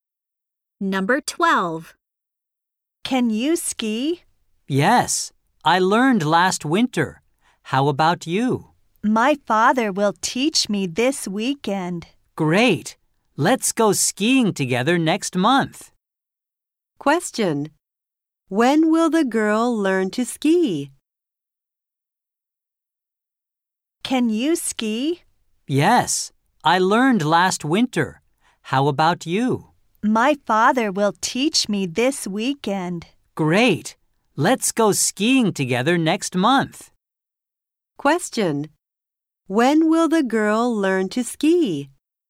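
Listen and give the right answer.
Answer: This weekend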